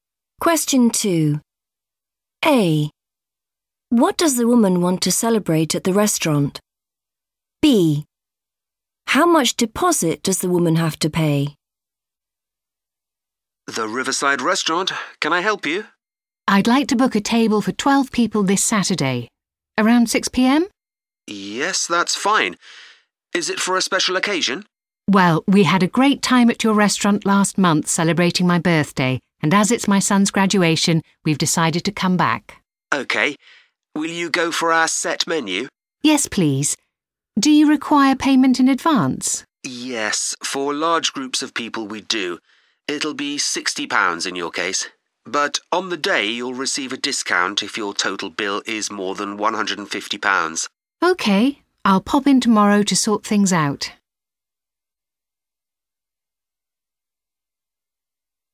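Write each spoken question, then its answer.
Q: What does the woman want to celebrate at the restaurant?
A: her son's graduation

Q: How much deposit does the woman have to pay?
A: £60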